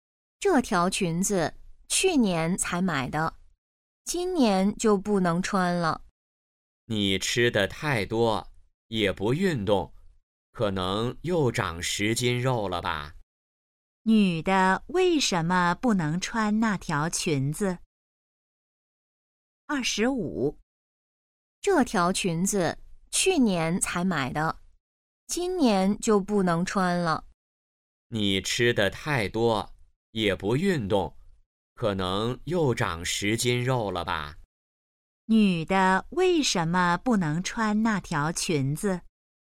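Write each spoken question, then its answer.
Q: 女的为什么不能穿那条裙子?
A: 她胖了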